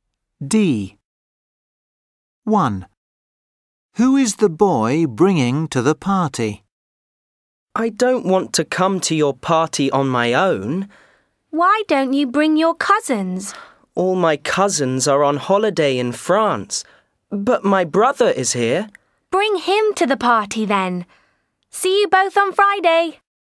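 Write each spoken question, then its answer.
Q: Who is the boy bringing to the party?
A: his brother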